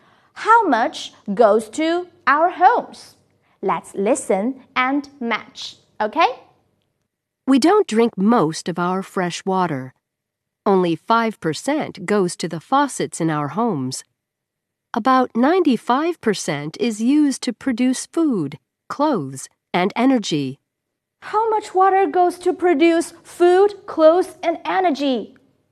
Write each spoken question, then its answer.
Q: How much water goes to produce food, clothes, and energy?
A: 95%